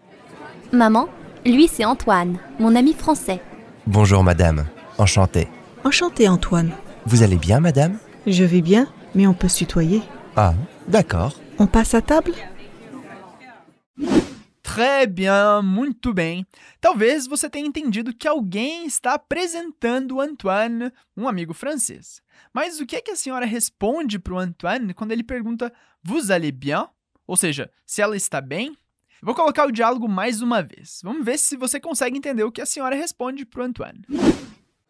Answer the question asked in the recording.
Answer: Ela diz: Je vais bien.